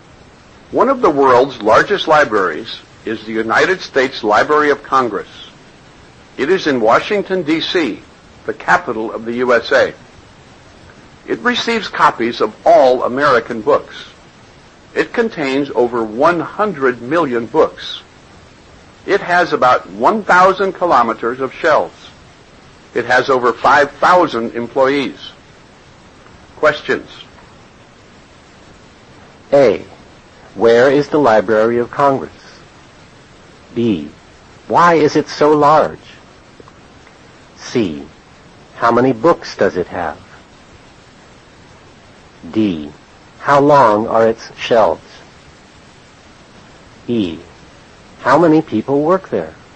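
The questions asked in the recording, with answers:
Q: Where is the Library of Congress?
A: In Washington, D.C.

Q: Why is it so large?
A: It receives copies of all American books.

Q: How many books does it have?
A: Over 100 million

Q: How long are its shelves?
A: About 1,000 kilometers

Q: How many people work there?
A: Over 5,000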